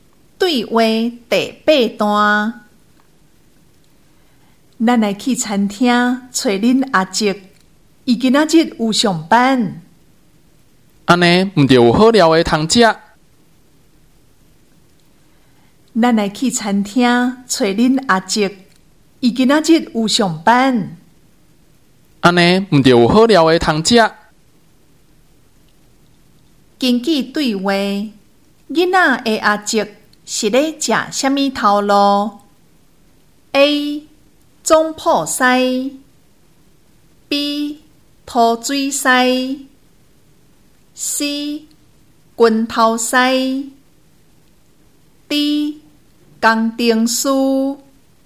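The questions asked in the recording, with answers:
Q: 根据对话,囡仔的阿叔是咧食虾米头路 ?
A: A: 中埔西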